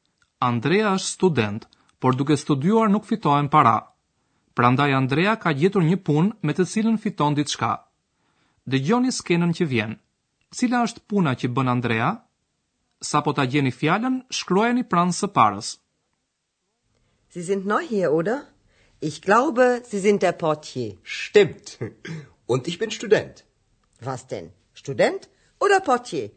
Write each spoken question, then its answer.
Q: Cila është puna që bën Andrea?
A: Andrea fiton para duke punuar si sportelist portier në gjermanisht portier